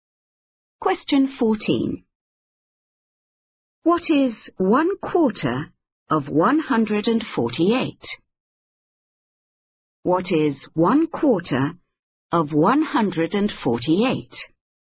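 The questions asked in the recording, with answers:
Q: What is 1/4 of 148?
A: 37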